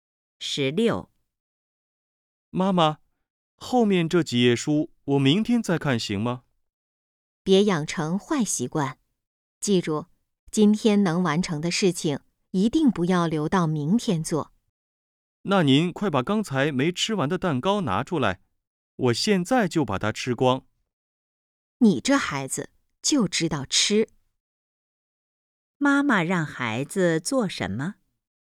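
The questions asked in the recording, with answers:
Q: 妈妈让孩子做什么?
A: 今天把后面几页书看完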